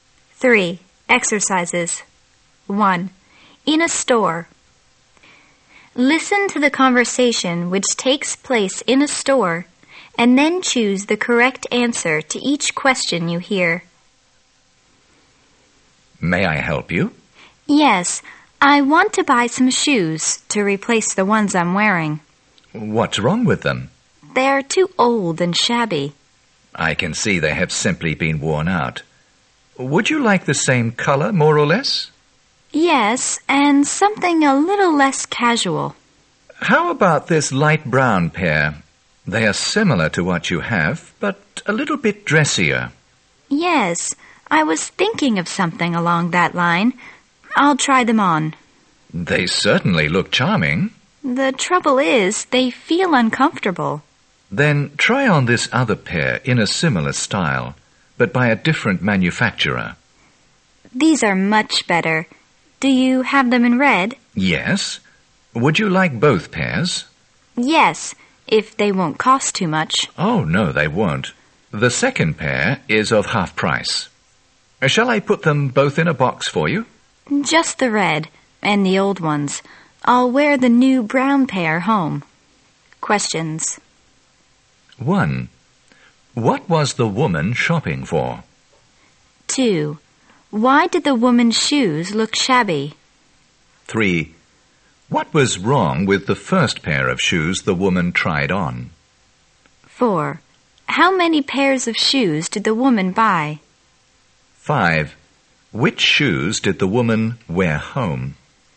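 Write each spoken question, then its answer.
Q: What was the woman shopping for?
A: Shoes

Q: Why did the woman's shoes look shabby?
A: They were old and worn out

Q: What was wrong with the first pair of shoes the woman tried on?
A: They felt uncomfortable

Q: How many pairs of shoes did the woman buy?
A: Two

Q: Which shoes did the woman wear home?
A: The new light brown pair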